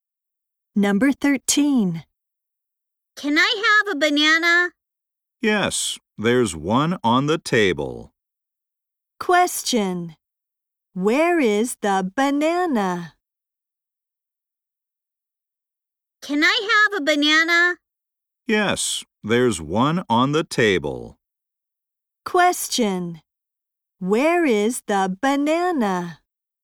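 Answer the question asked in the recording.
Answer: On the table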